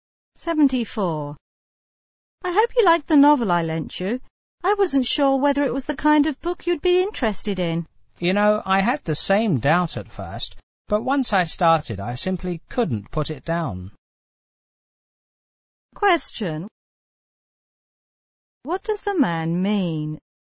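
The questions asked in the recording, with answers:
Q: What does the man mean?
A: He enjoyed the novel very much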